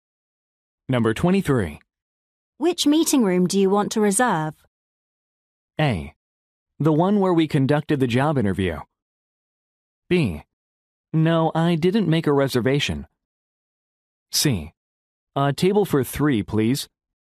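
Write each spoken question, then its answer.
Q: Which meeting room do you want to reserve?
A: A: The one where we conducted the job interview.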